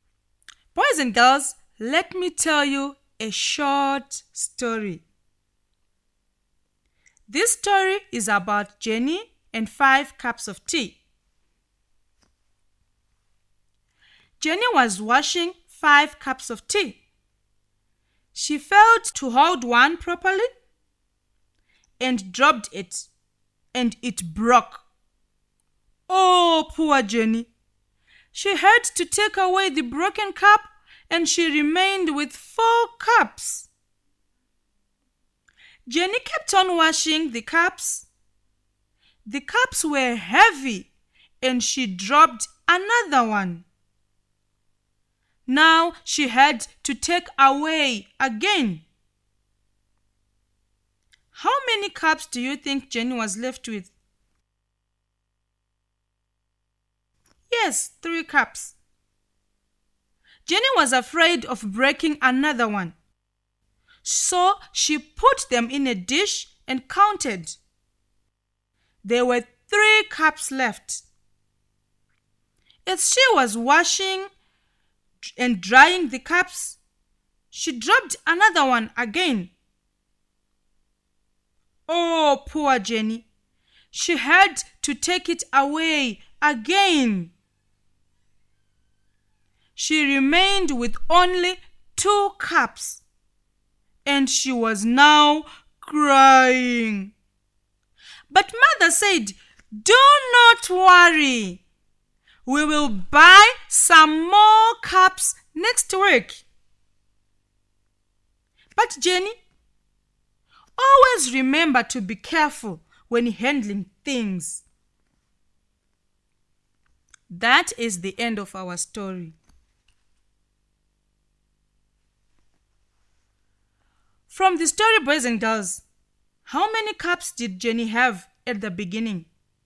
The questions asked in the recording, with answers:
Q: From the story, boys and girls, how many cups did Jenny have at the beginning?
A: I'm sure you said 5. That's correct.